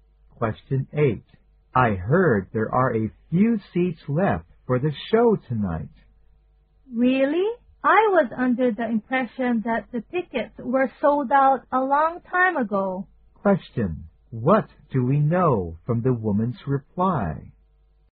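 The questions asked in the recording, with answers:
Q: What do we know from the woman's reply?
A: She is surprised; she thought the tickets had been sold out long ago.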